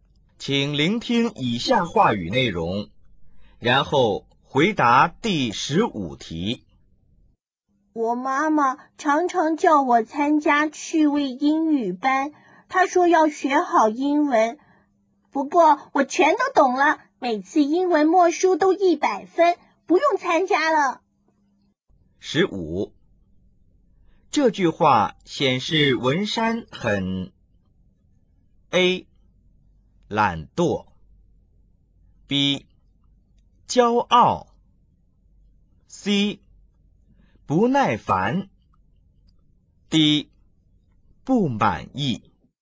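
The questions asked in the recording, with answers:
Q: 这句话显示文山很 A 懒惰, B 骄傲, C 不耐烦, D 不满意。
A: B: 骄傲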